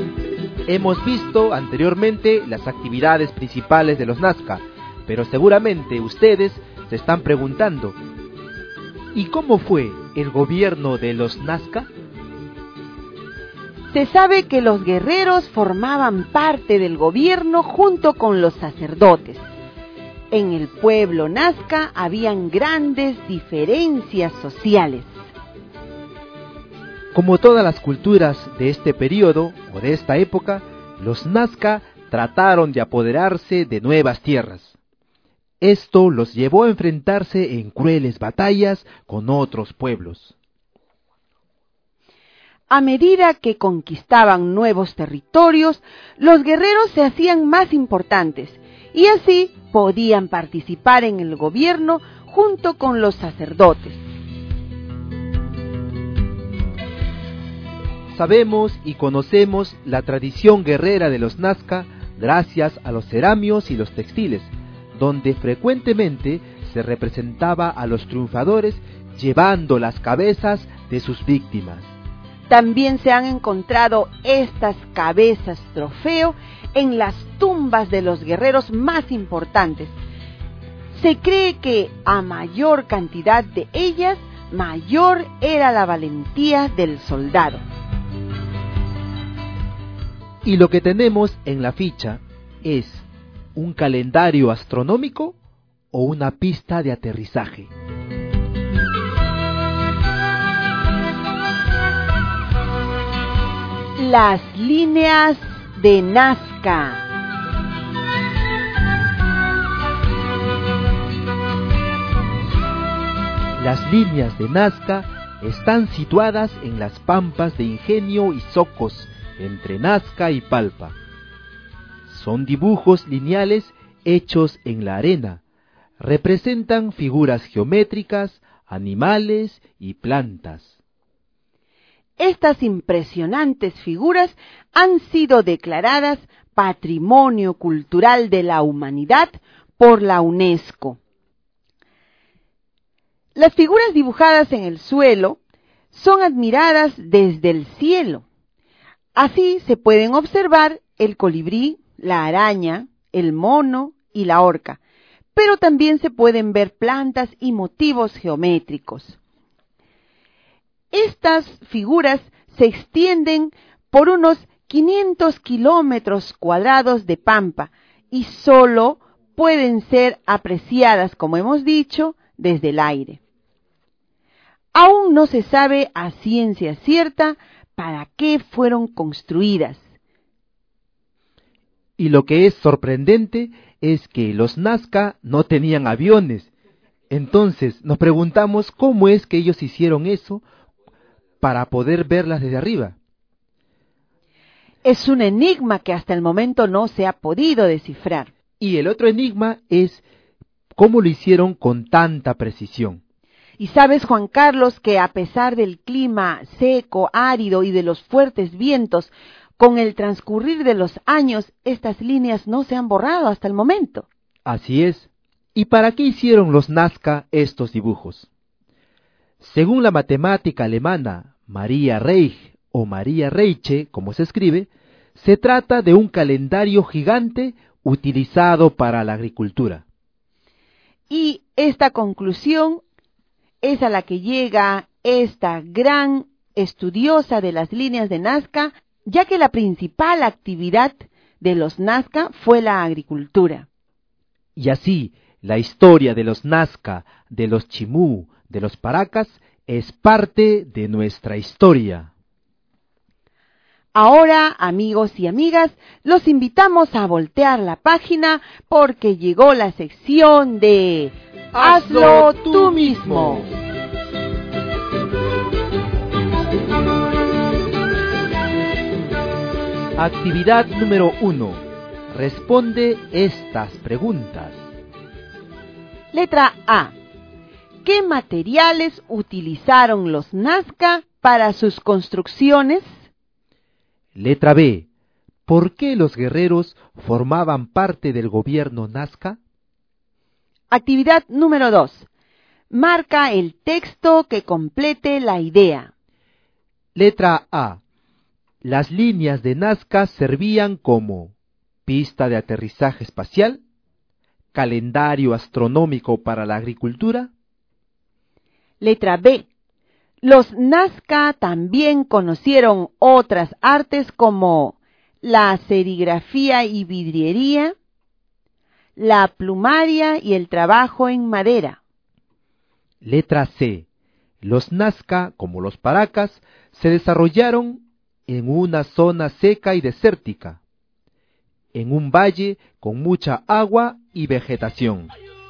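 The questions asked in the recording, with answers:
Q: Letra B. ¿Por qué los guerreros formaban parte del gobierno Nazca?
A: Porque al conquistar nuevos territorios se hacían más importantes

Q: Letra A. Las líneas de Nazca servían como pista de aterrizaje espacial, calendario astronómico para la agricultura.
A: calendario astronómico para la agricultura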